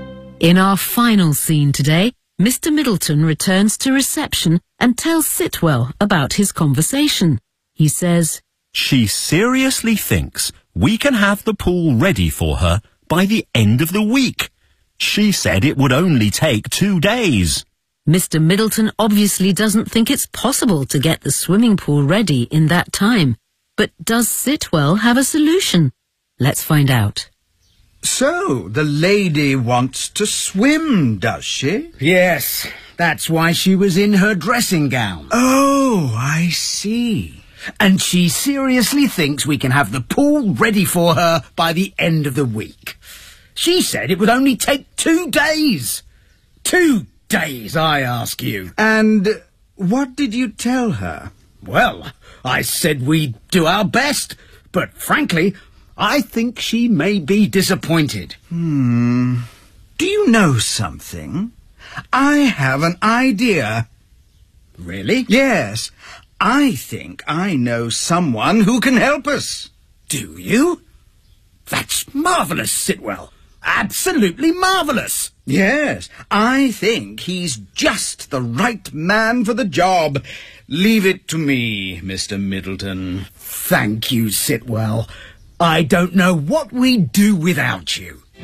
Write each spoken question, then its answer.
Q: But does Sitwell have a solution?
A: Of course he does.